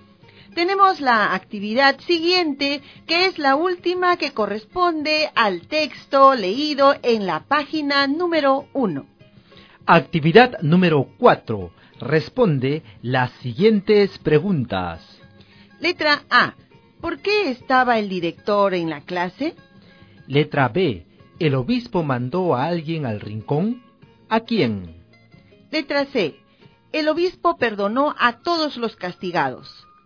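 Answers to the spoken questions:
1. Porque faltó el profesor y entró a reemplazarlo
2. Sí, a Francisco, el más pequeñito, y a los que no respondían bien
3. Sí, porque le gustó la picardía del niño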